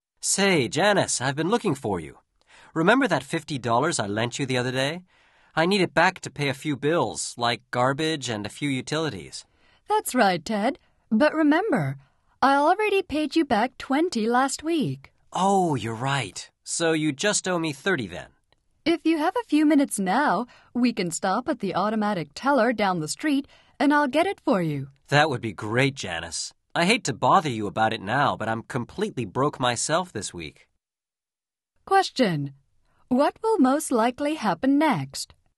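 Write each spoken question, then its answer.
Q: What will most likely happen next?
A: They will go to the ATM down the street and Janice will get the $30 she owes Ted.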